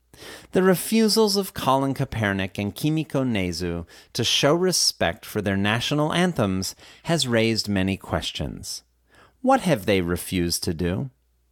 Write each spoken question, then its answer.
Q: What have they refused to do?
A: They have refused to show respect for their national anthems.